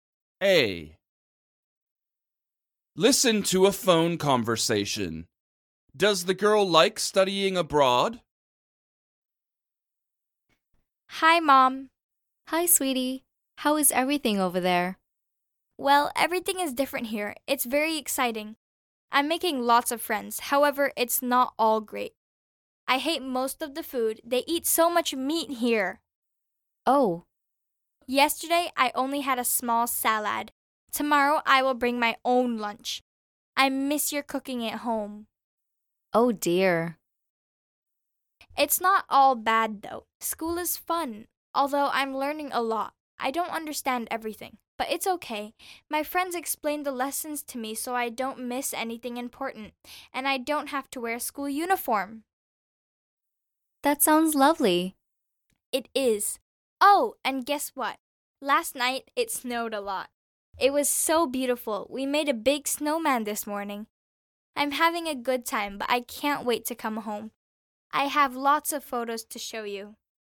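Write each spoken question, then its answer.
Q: Does the girl like studying abroad?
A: Yes, mostly. She is having a good time, although she dislikes the food.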